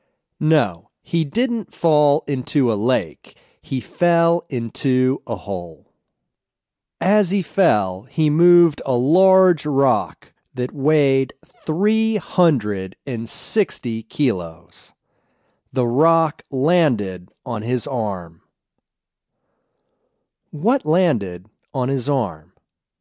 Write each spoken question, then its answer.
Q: What landed on his arm?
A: A large rock landed on his arm.